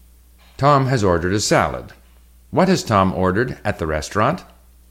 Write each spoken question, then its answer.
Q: What has Tom ordered at the restaurant?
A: He has ordered a salad.